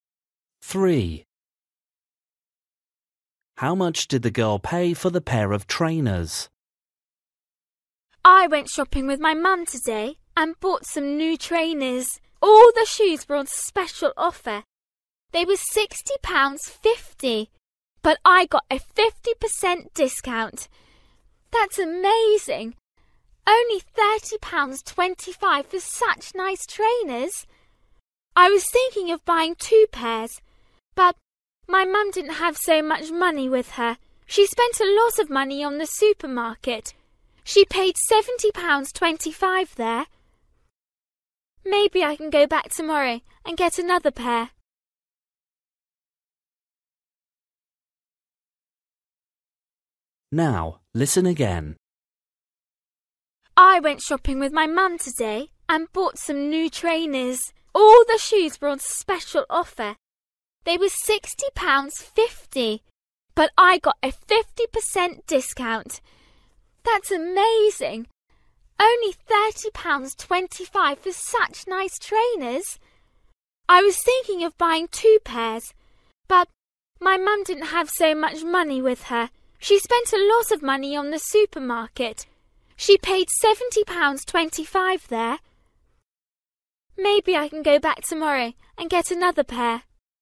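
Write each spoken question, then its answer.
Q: How much did the girl pay for the pair of trainers?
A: £30.25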